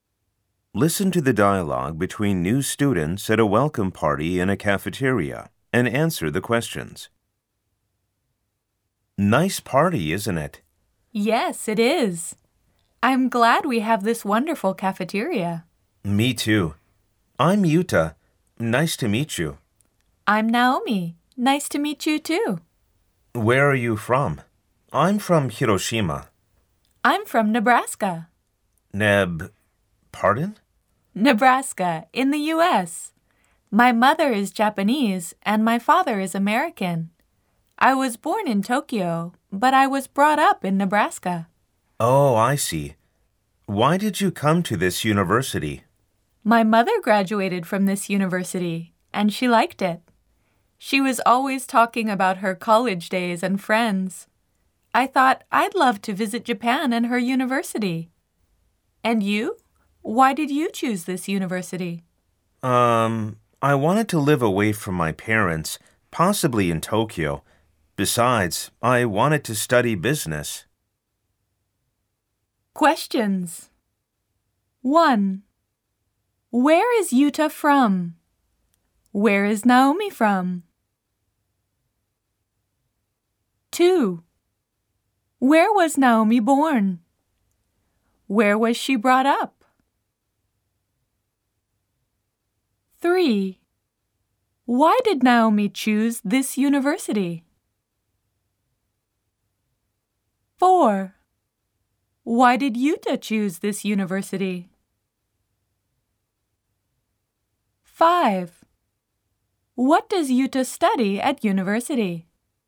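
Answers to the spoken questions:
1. Hiroshima
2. Nebraska, in the U.S.
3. Born in Tokyo, brought up in Nebraska
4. Her mother graduated from it and liked it
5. He wanted to live away from his parents, possibly in Tokyo, and study business
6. Business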